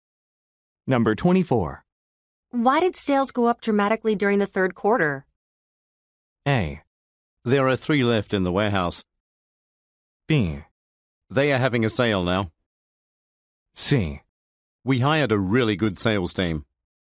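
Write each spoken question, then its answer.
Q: Why did sales go up dramatically during the third quarter?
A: C: We hired a really good sales team.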